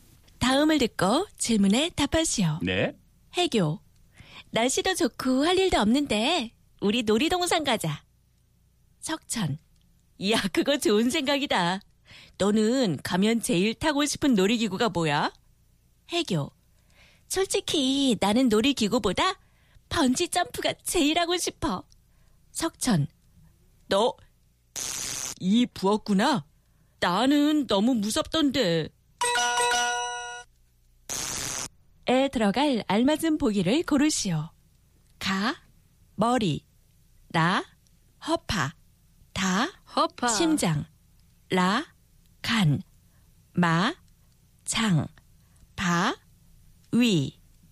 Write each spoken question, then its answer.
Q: 에 들어갈 알맞은 보기를 고르시오. 가, 머리, 나, 허파.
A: La, liver. So, 너 간이 부었구나.